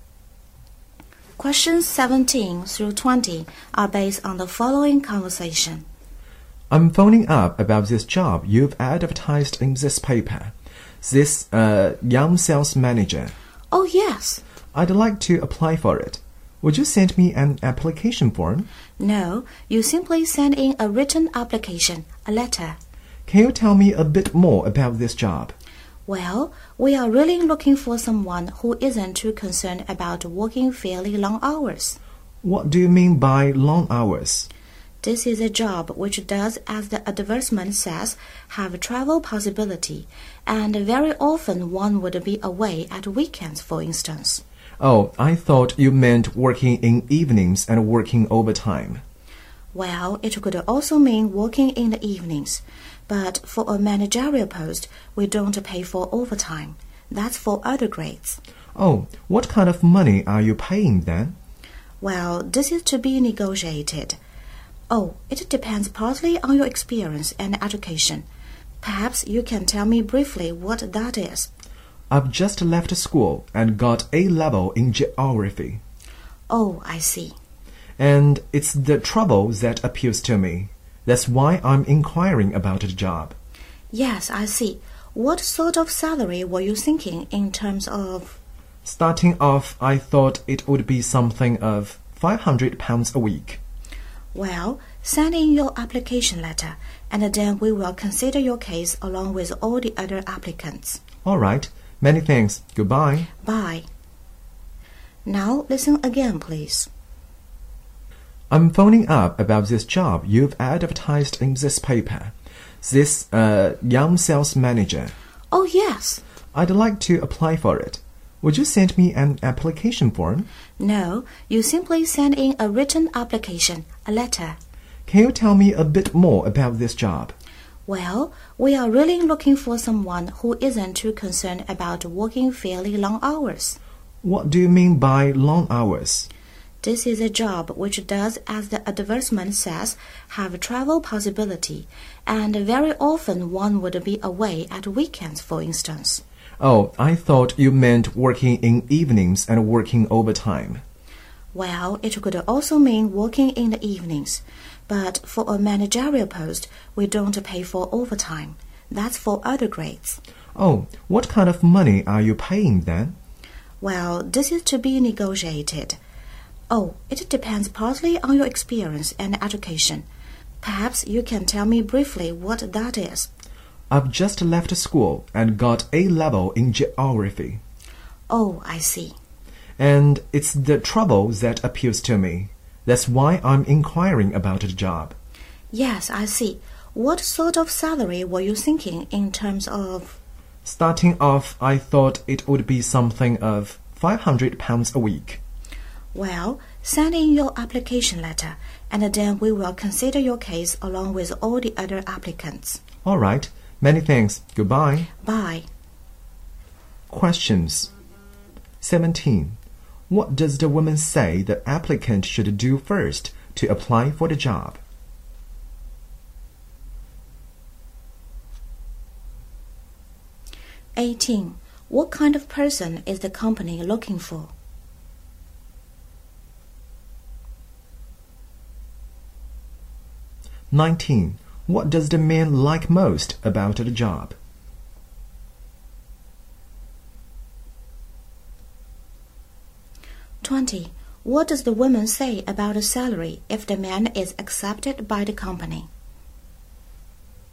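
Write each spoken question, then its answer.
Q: What does the woman say the applicant should do first to apply for the job?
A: Send in a written application letter

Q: What kind of person is the company looking for?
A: Someone willing to work long hours

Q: What does the woman say about the salary if the man is accepted by the company?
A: It is to be negotiated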